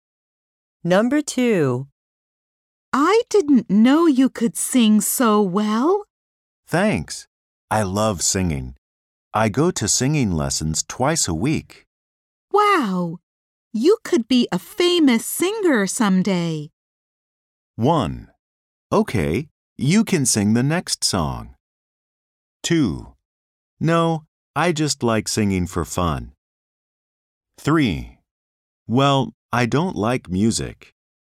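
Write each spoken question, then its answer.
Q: Wow! You could be a famous singer someday.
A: 2: No, I just like singing for fun.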